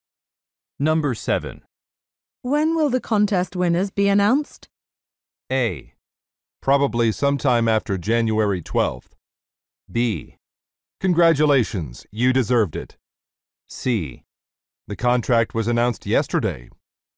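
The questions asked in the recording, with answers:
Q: When will the contest winners be announced?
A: A: Probably sometime after January 12th.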